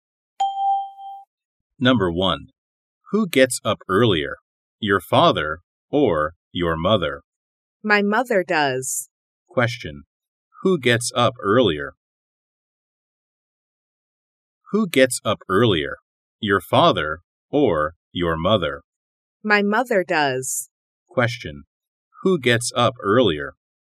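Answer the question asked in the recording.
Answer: The mother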